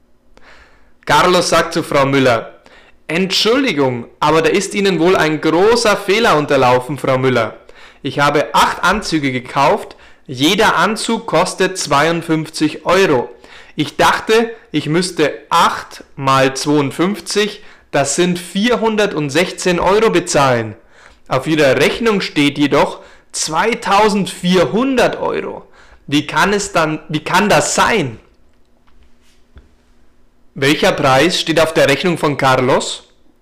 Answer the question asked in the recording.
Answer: 2400 Euro. Auf der Rechnung von Carlos steht 2400 Euro.